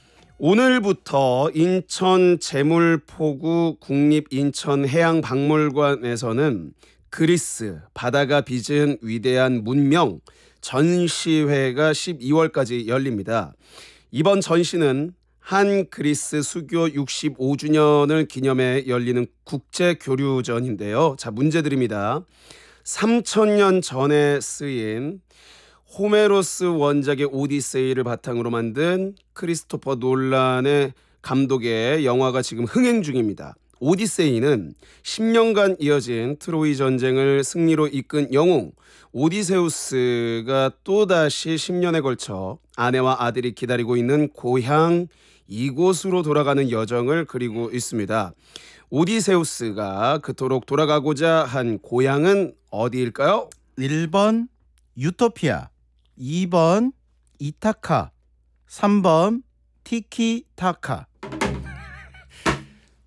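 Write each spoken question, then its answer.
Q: 오디세우스가 그토록 돌아가고자 한 고향은 어디일까요?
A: 2번: 이타카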